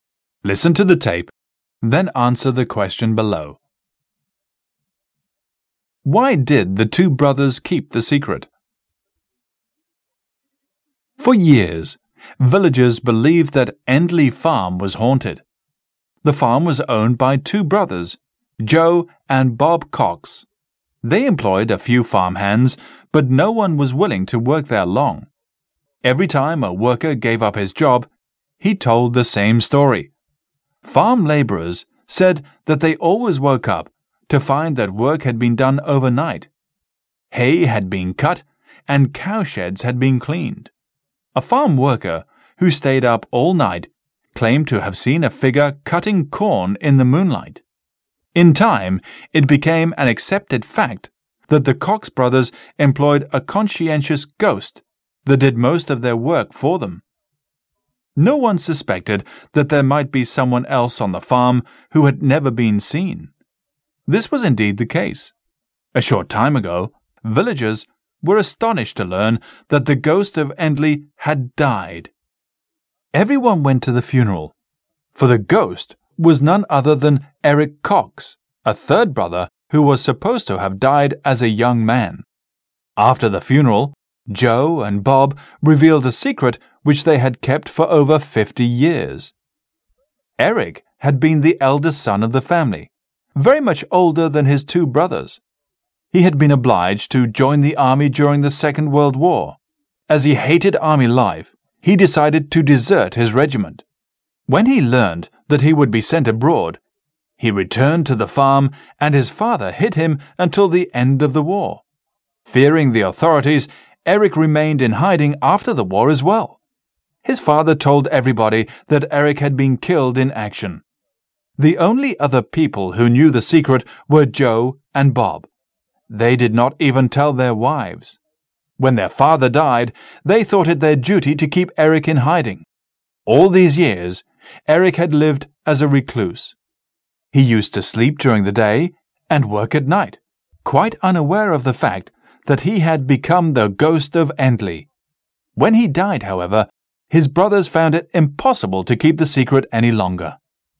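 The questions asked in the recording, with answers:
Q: Why did the two brothers keep the secret?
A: To keep Eric hidden, because he had deserted the army and feared the authorities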